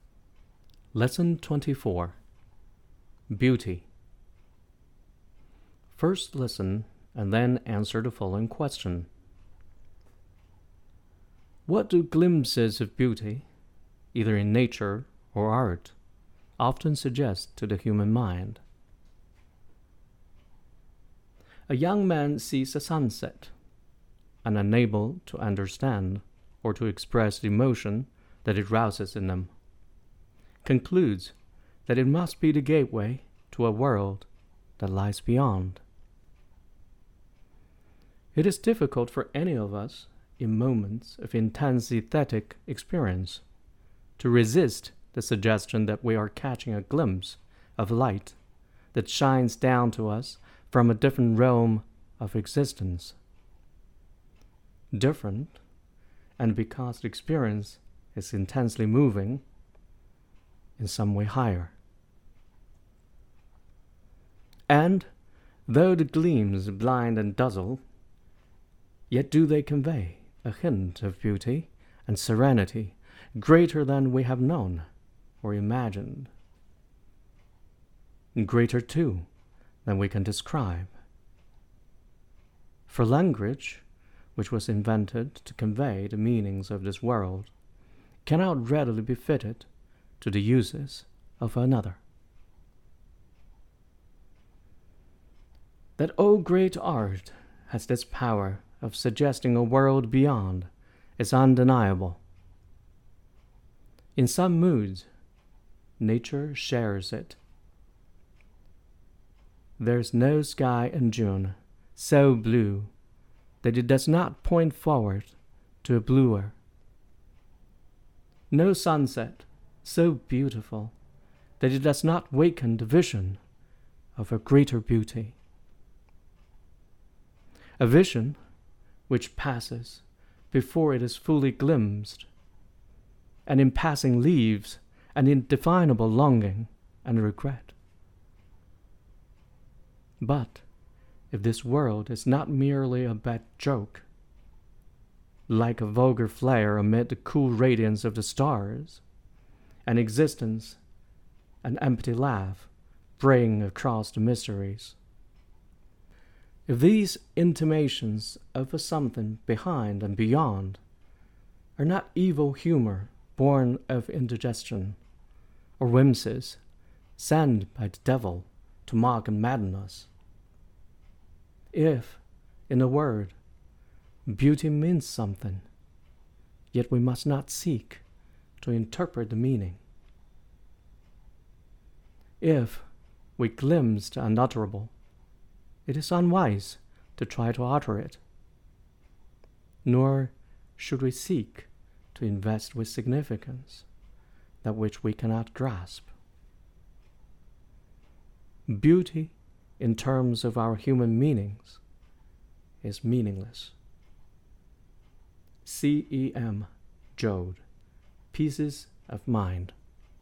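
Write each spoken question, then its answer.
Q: What do glimpses of beauty, either in nature or art, often suggest to the human mind?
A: That there is a different, higher world or realm of existence beyond this one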